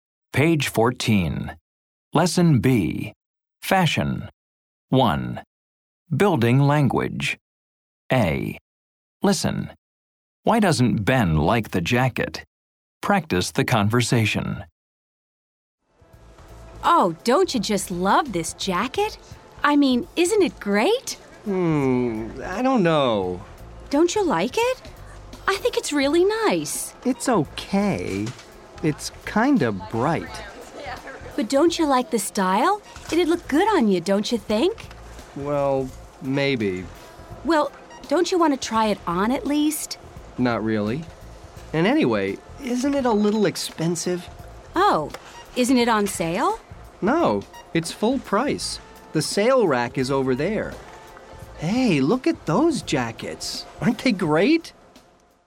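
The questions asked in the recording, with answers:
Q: Why doesn't Ben like the jacket?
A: It's kind of bright, and it's a little expensive (full price).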